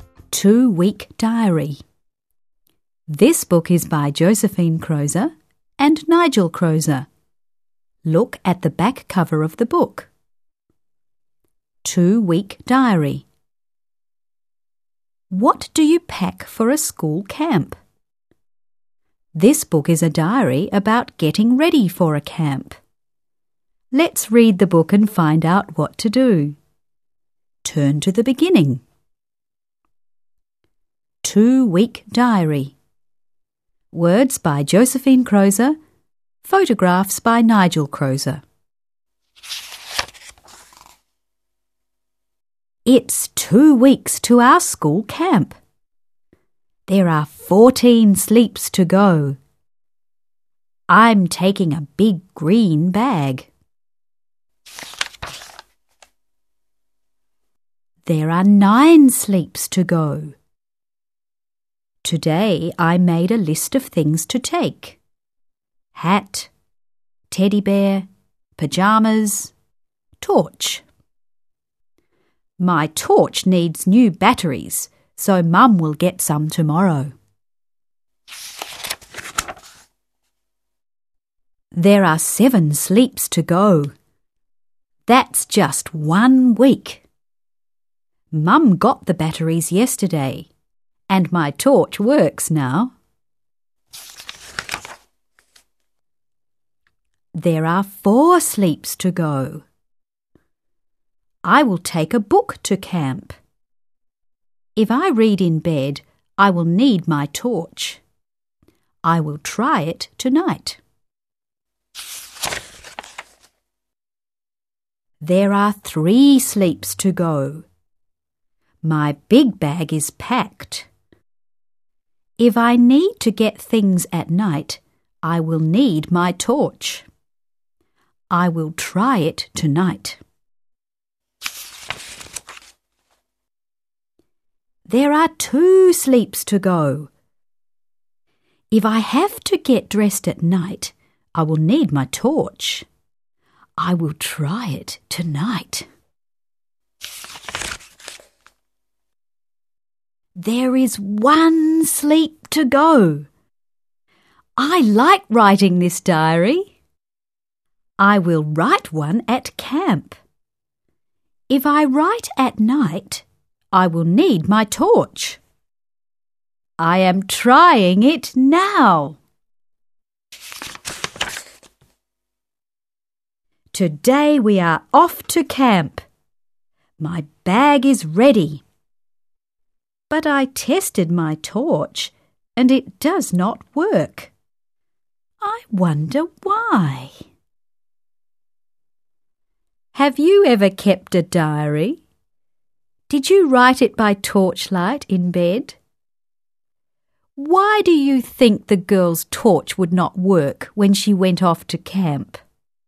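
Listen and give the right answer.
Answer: She used up the batteries by trying the torch every night before camp.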